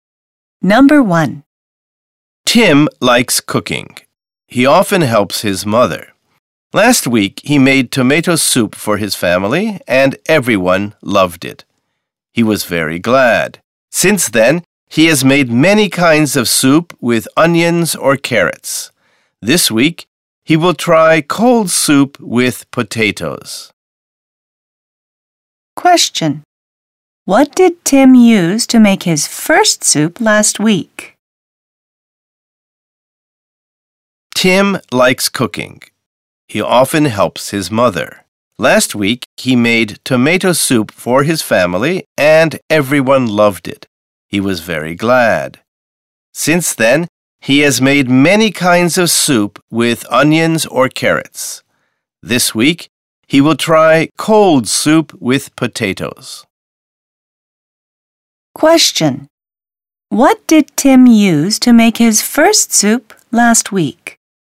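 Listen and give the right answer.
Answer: Tomatoes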